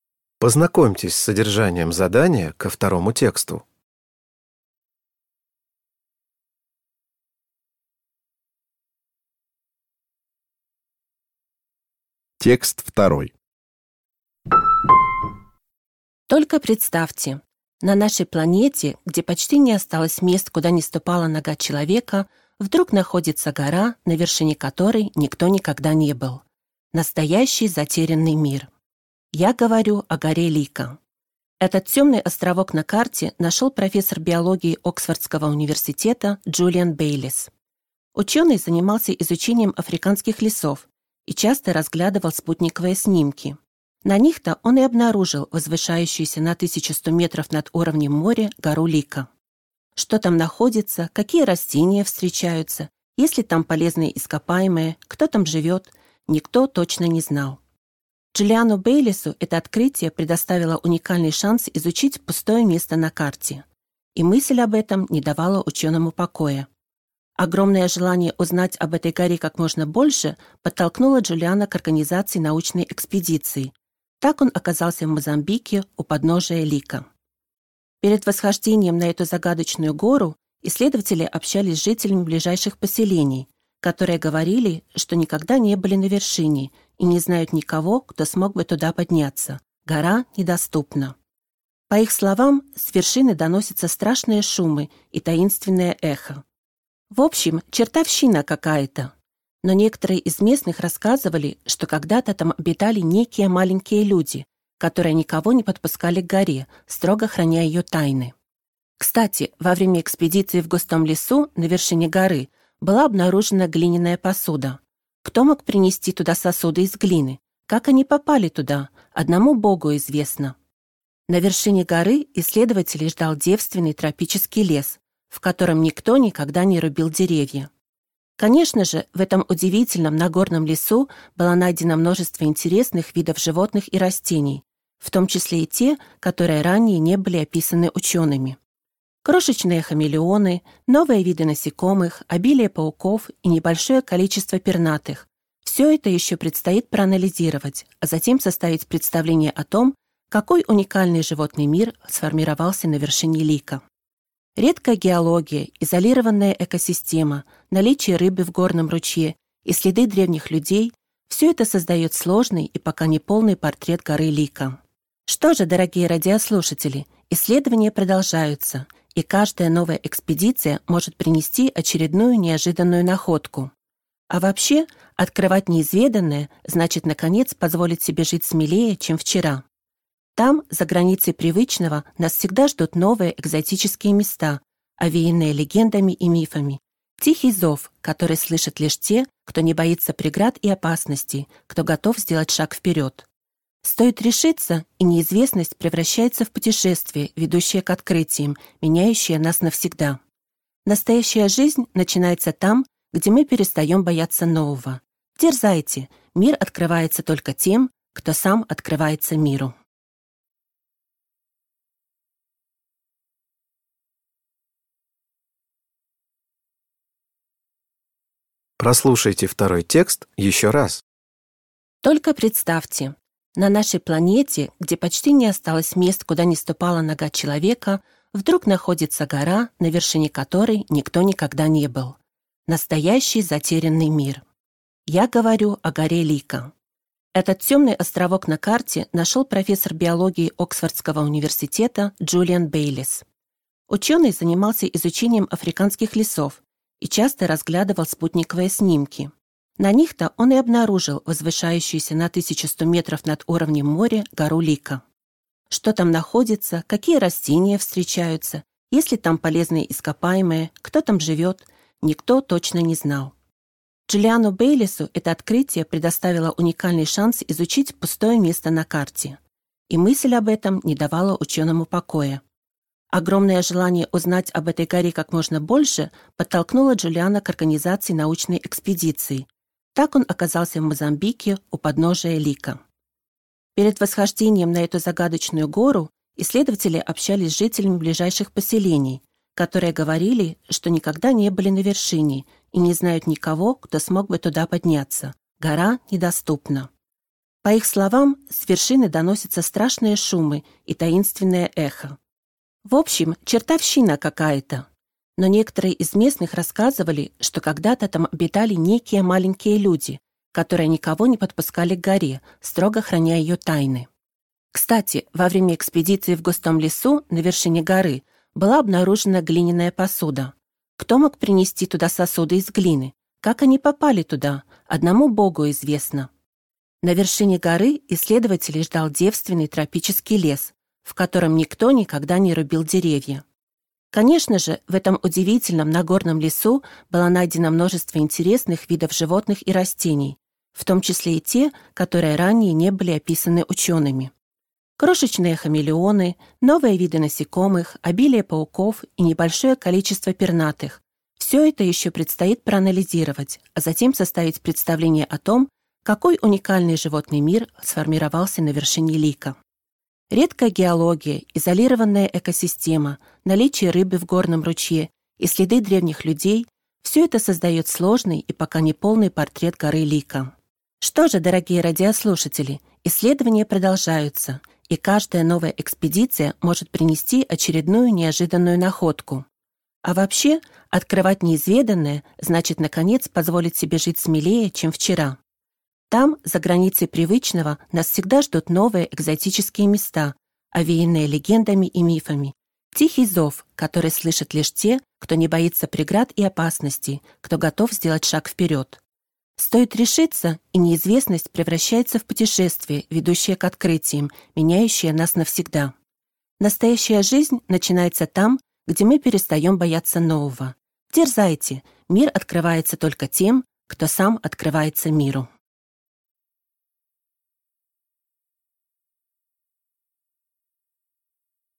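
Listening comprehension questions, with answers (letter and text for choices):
Прослушайте дважды два текста. Из предложенных ответов (A–D) выберите правильный ответ, соответствующий содержанию текста, и обведите его кружком. Задания 2.1.–2.3. относятся к первому тексту, а задания 2.4.–2.6. – ко второму.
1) Гора Лико заинтересовала Джулиана Бейлисса, потому что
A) он хотел разработать новый туристический маршрут в лесах Африки.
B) на её вершине были открыты залежи редких минералов.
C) её до сих пор никто не исследовал.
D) его привлекла загадочная легенда.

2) Каким выражением можно описать мнение местных жителей о горе Лико?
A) Не боги горшки обжигают.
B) Книга за семью печатями.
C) Под лежачий камень вода не течёт.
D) Не так страшен чёрт, как его малюют.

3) Обращаясь к слушателям в конце текста, автор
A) призывает осваивать новые горизонты.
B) рекомендует необычные туристические направления.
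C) советует черпать вдохновение в древних мифах и поверьях.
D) предостерегает перед опасностью нарушения баланса между природой и человеком.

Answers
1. C) её до сих пор никто не исследовал.
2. B) Книга за семью печатями.
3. A) призывает осваивать новые горизонты.

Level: Poziom: dwujęzyczny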